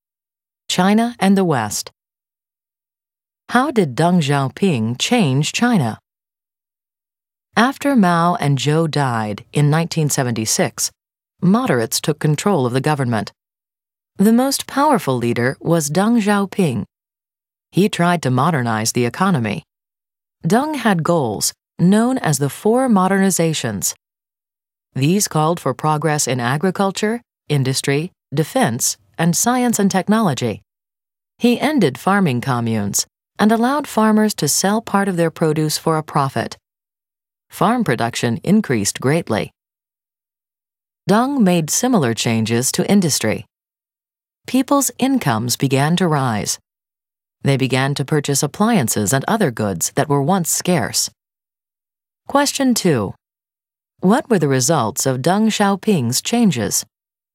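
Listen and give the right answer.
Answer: Farm production increased greatly and people's incomes rose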